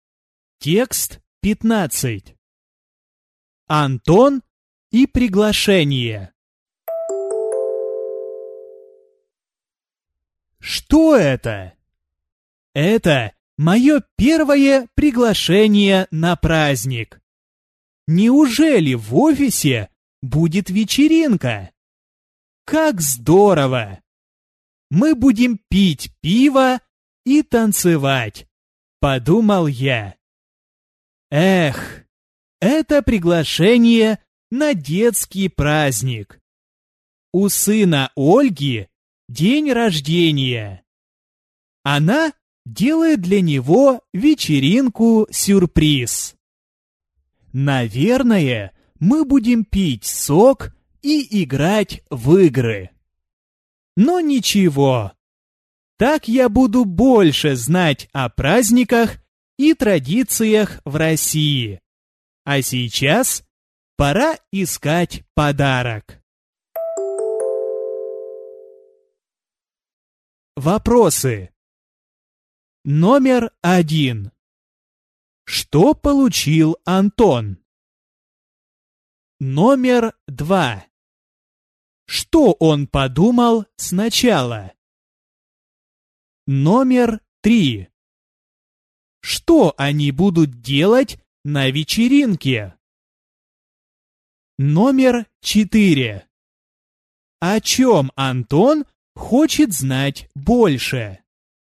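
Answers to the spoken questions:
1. Приглашение на детский праздник
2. Что в офисе будет вечеринка, они будут пить пиво и танцевать
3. Наверное, пить сок и играть в игры
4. О праздниках и традициях в России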